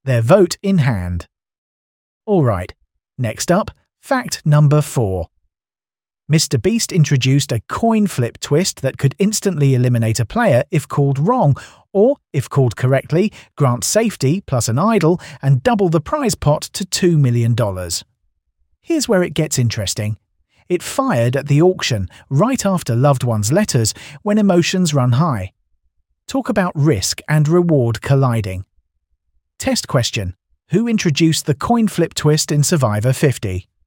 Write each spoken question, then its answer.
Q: Who introduced the coin flip twist in Survivor 50?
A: Mr. Beast.